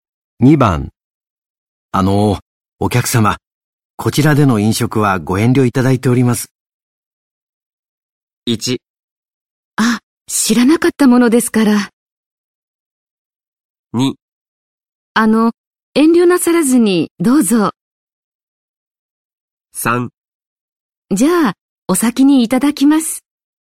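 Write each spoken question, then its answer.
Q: お客様、こちらでの飲食はご遠慮いただいております。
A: 1: あ、知らなかったものですから。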